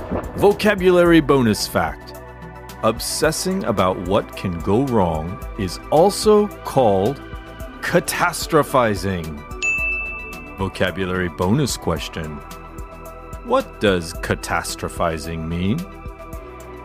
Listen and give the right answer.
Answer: Obsessing about what can go wrong is also called catastrophizing.